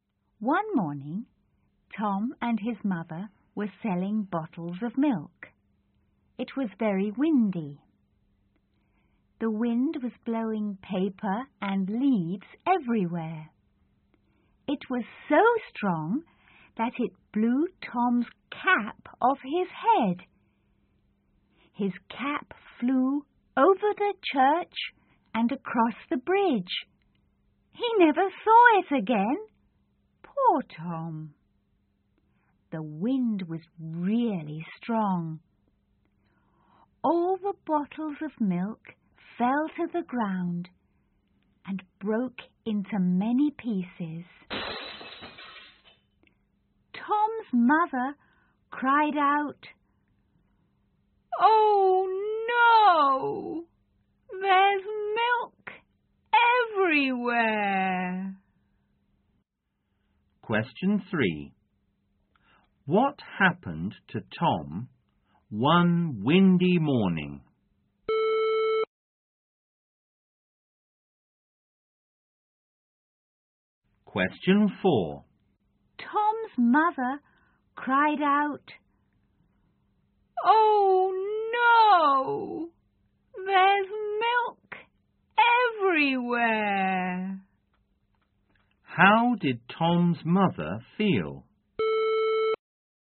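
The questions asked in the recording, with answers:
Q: What happened to Tom one windy morning?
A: The wind blew his cap off his head and he never saw it again.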